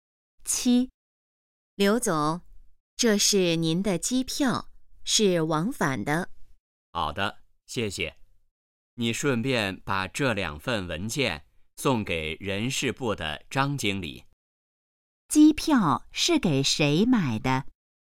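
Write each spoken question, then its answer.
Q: 机票是给谁买的?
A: 刘总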